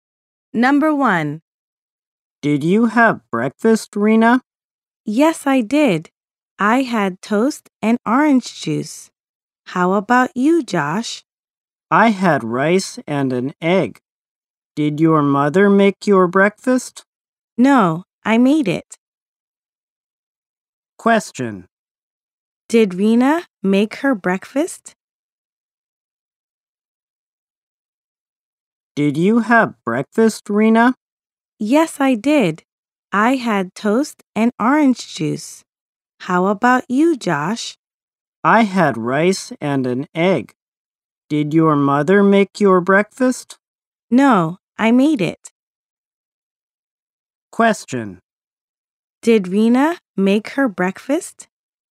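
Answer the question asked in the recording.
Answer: Yes, she did.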